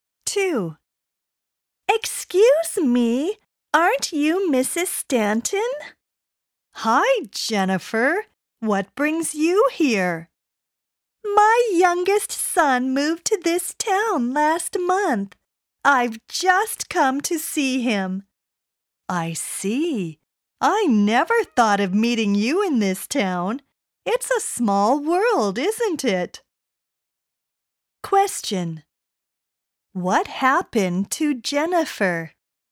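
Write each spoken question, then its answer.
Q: What happened to Jennifer?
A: She unexpectedly met Mrs. Stanton, someone she knew, in a town where she didn't expect to see her.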